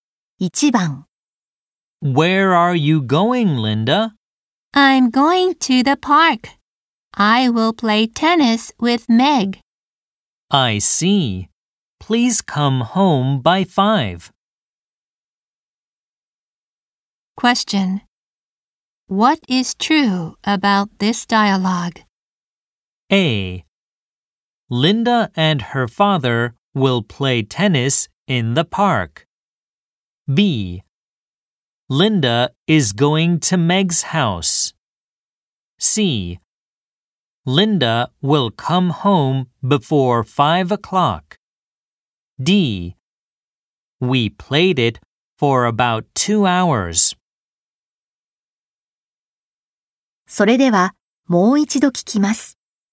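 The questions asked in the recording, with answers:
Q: What is true about this dialogue?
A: C: Linda will come home before 5 o'clock.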